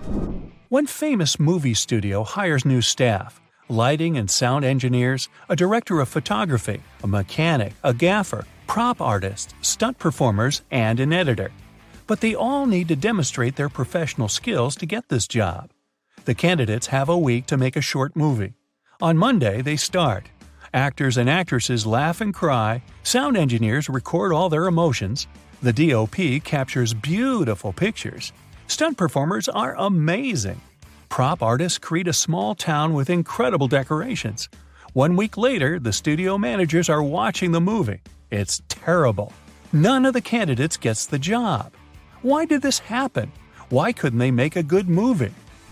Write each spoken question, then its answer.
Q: Why did this happen? Why couldn't they make a good movie?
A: There was no director among them, and no screenwriter to write a script.